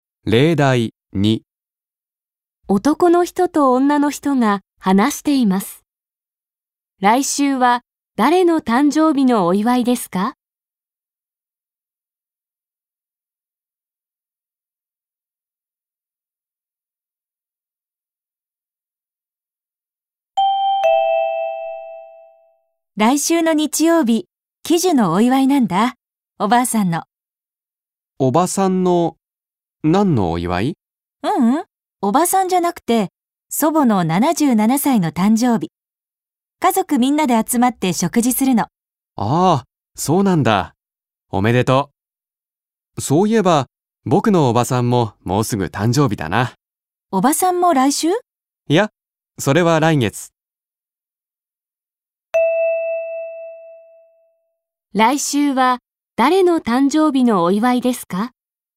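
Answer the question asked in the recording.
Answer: 祖母(おばあさん)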